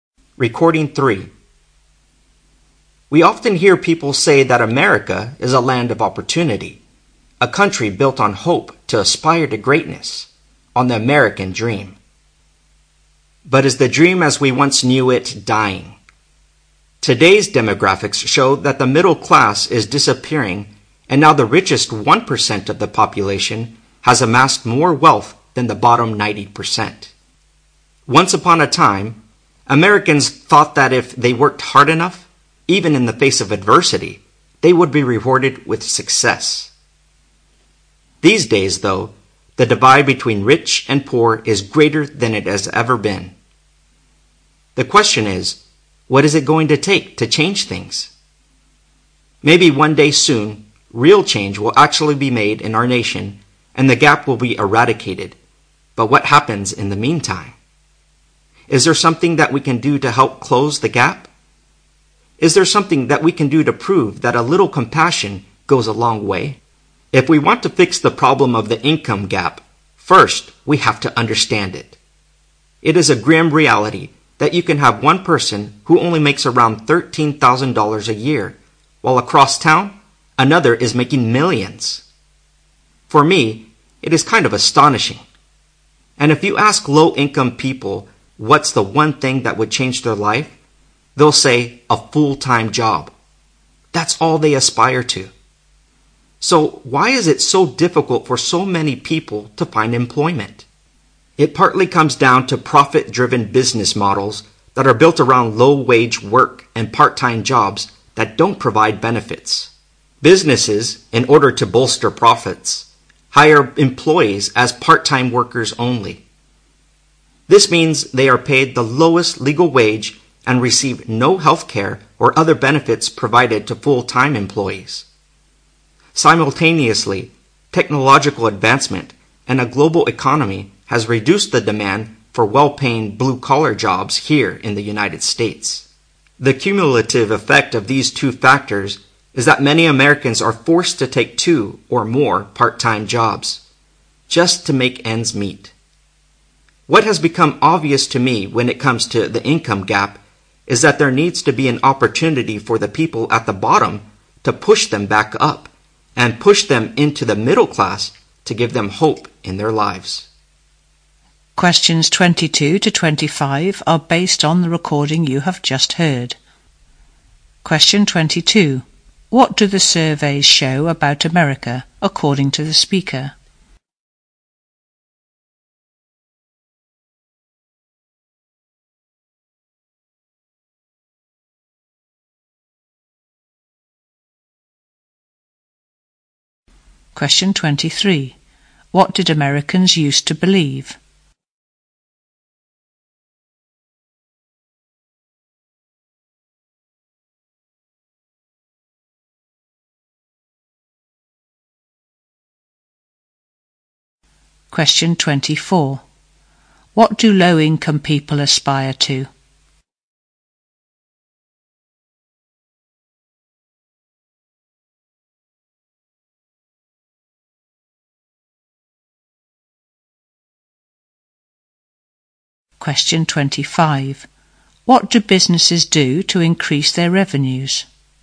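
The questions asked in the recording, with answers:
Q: What do the surveys show about America, according to the speaker?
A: The middle class is disappearing; the richest 1% have more wealth than the bottom 90%

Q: What did Americans used to believe?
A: Hard work would be rewarded with success

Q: What do low-income people aspire to?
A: A full-time job

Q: What do businesses do to increase their revenues?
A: Hire employees as part-time workers only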